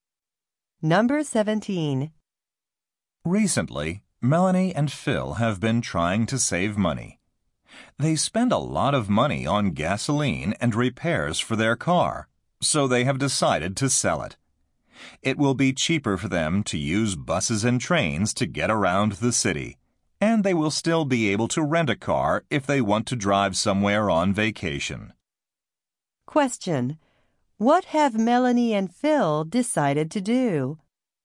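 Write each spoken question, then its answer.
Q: What have Melanie and Phil decided to do?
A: Sell their car.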